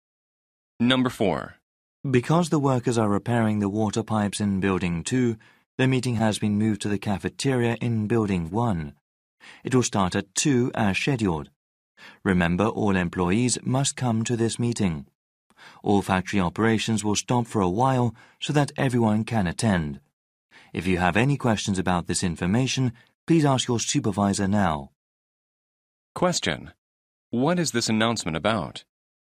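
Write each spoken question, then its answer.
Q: What is this announcement about?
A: A change of meeting location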